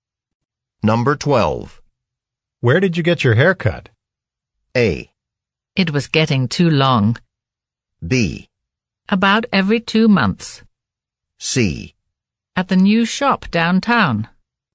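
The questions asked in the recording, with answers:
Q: Where did you get your haircut?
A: C: At the new shop downtown.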